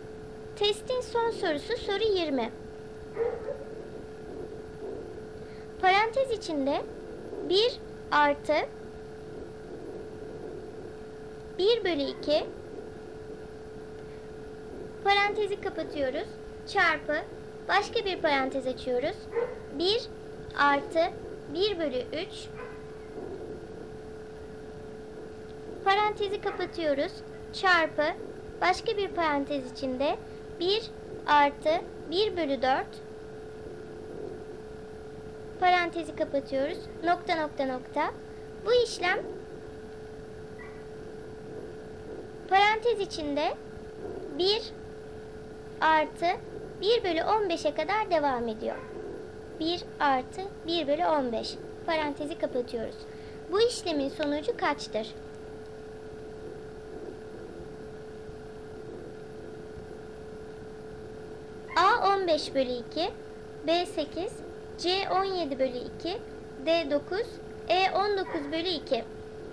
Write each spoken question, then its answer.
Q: Bu işlemin sonucu kaçtır?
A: Doğru cevap B 8.